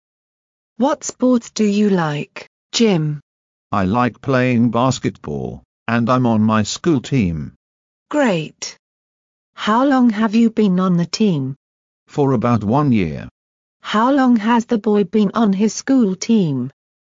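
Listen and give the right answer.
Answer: For about 1 year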